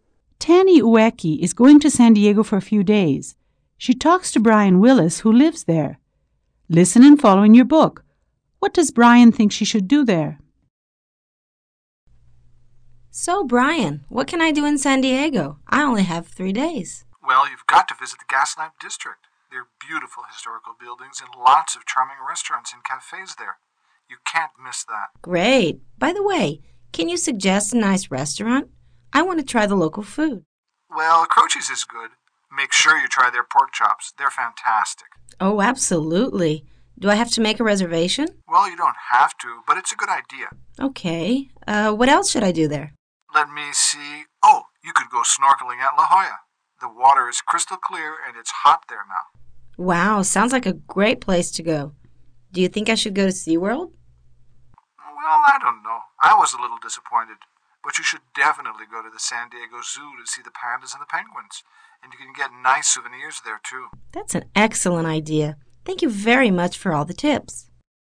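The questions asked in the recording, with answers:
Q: What does Brian think she should do there?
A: Visit the Gaslamp District, eat at Croce's (try the pork chops), go snorkeling at La Jolla, and go to the San Diego Zoo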